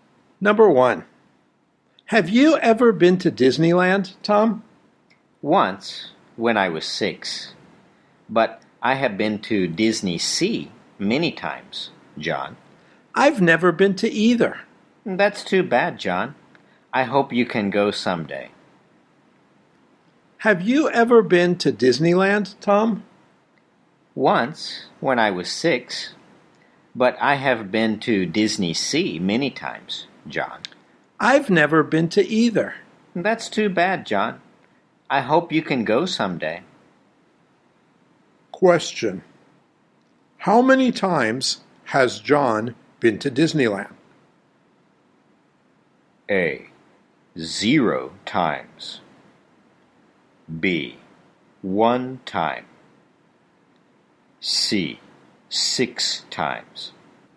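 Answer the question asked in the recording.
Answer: A: 0 times.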